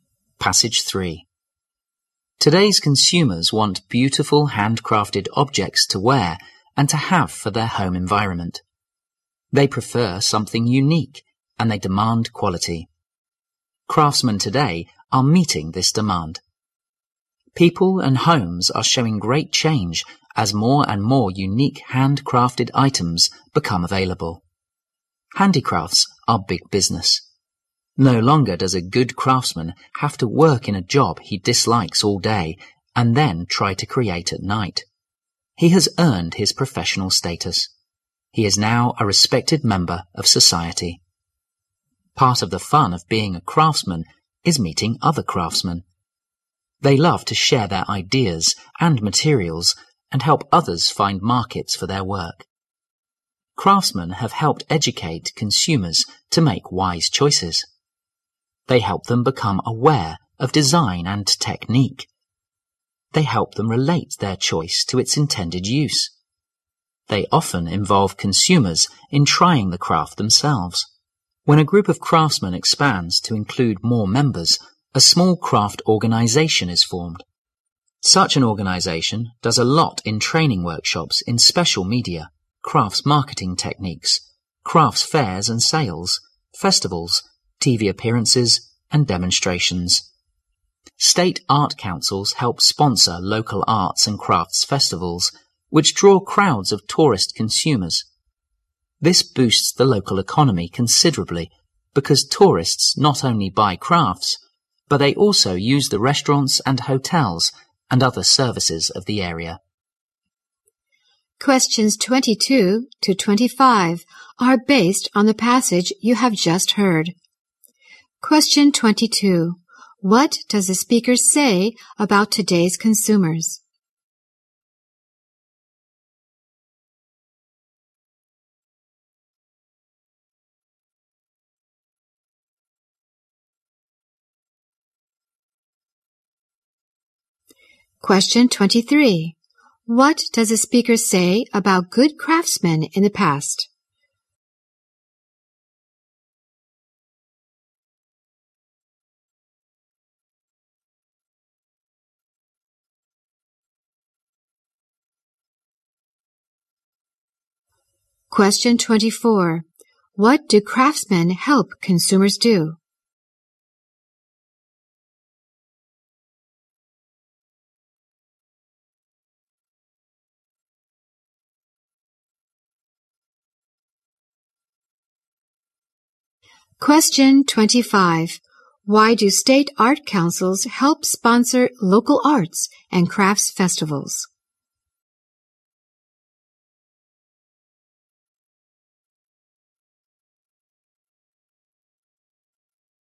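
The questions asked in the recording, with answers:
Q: What does the speaker say about today's consumers?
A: They want unique, quality handcrafted items

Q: What does the speaker say about good craftsmen in the past?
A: They worked in jobs they disliked and created at night

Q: What do craftsmen help consumers do?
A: Make wise choices

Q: Why do state art councils help sponsor local arts and crafts festivals?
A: To boost the local economy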